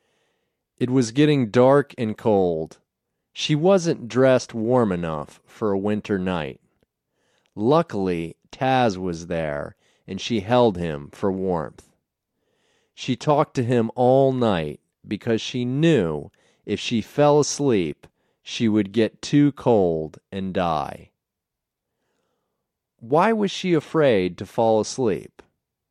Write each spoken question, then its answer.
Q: Why was she afraid to fall asleep?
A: If she fell asleep, she would get too cold and die.